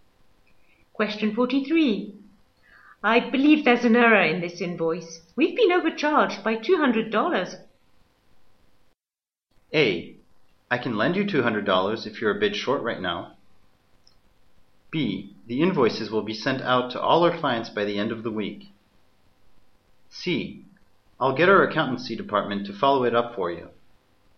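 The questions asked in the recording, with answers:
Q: I believe there's an error in this invoice.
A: C: I'll get our accountancy department to follow it up for you.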